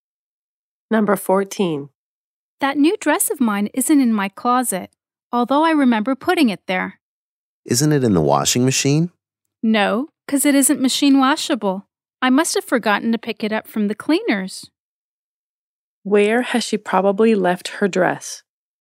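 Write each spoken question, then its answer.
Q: Where has she probably left her dress?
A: At the cleaners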